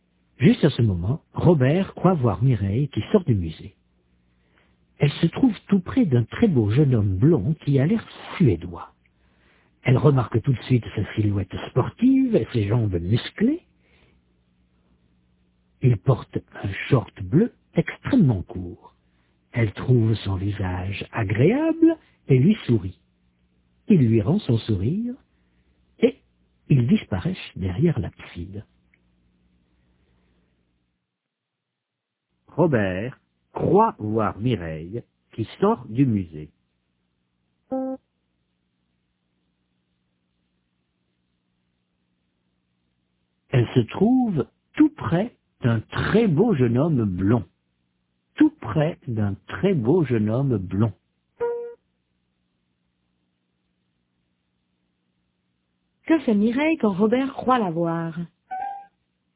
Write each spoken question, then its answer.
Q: Que fait Mireille quand Robert croit la voir?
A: Elle sort du musée.